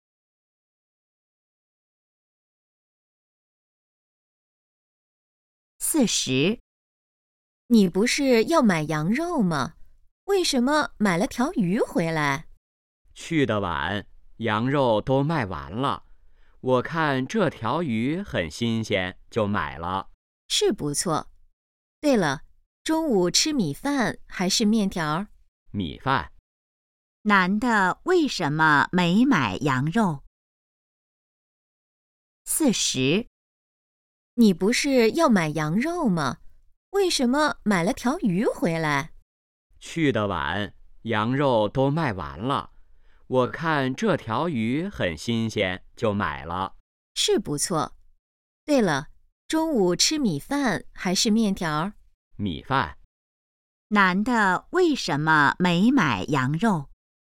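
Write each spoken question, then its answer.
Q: 男的为什么没买羊肉?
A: 羊肉卖完了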